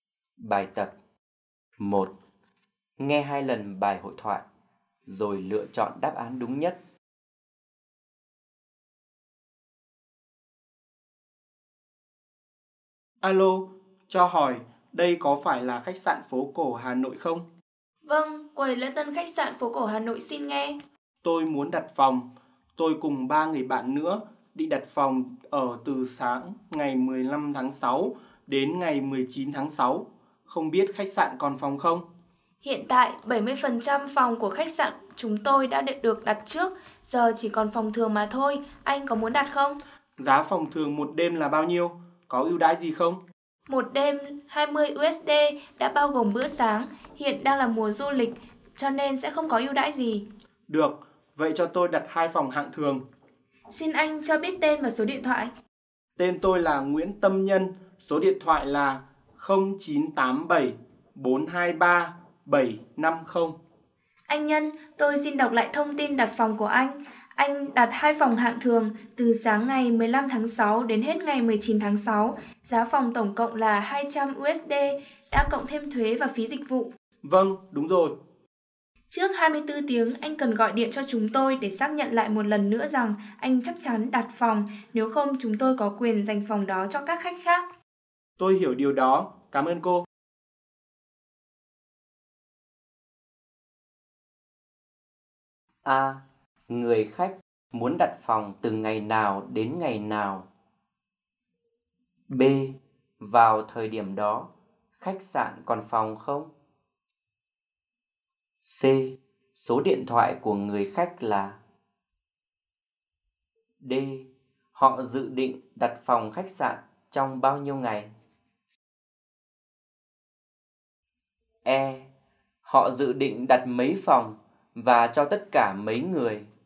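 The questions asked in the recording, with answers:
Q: Người khách muốn đặt phòng từ ngày nào đến ngày nào?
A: Từ sáng ngày 15 tháng 6 đến hết ngày 19 tháng 6

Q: Vào thời điểm đó, khách sạn còn phòng không?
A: Còn, nhưng chỉ còn phòng hạng thường

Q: Số điện thoại của người khách là?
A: 0987-423-750

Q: Họ dự định đặt mấy phòng và cho tất cả mấy người?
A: 2 phòng cho 4 người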